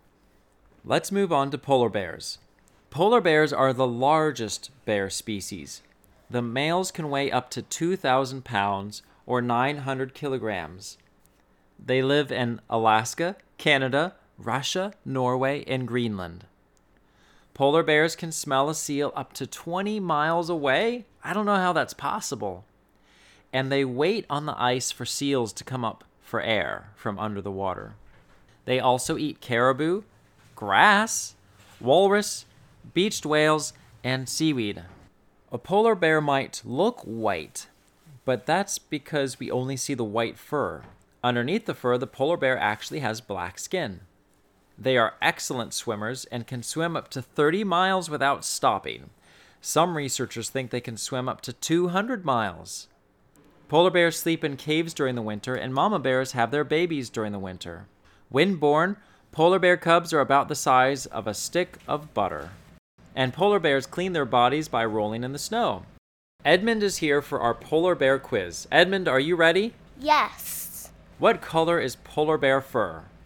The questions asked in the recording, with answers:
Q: What color is polar bear fur?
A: Polar bear fur is white.